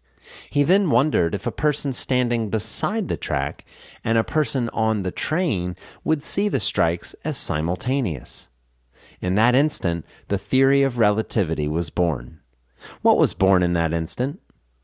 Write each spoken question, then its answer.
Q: What was born in that instant?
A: In that instant, the theory of relativity was born.